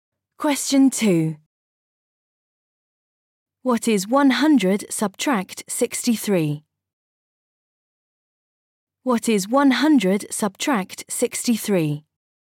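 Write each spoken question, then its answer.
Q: What is 100 subtract 63?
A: 37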